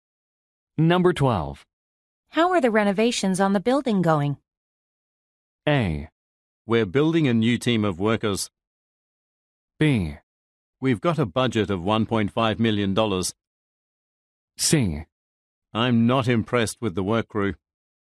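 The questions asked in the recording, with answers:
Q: How are the renovations on the building going?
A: C: I'm not impressed with the work crew.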